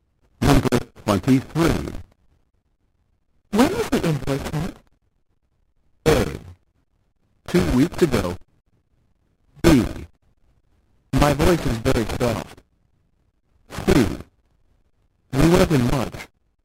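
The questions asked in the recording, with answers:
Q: When was the invoice sent?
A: A: 2 weeks ago.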